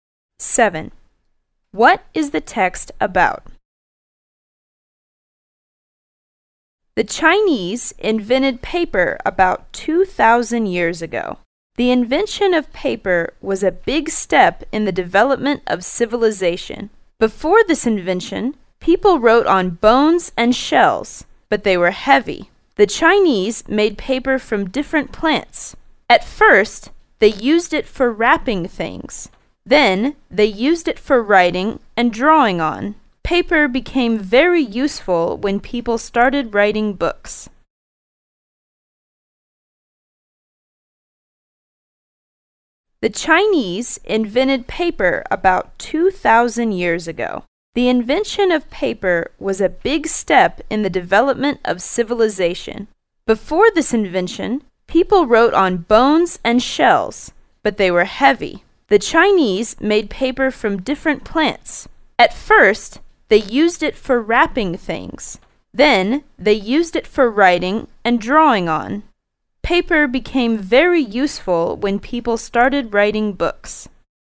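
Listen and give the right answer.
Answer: The invention of paper by the Chinese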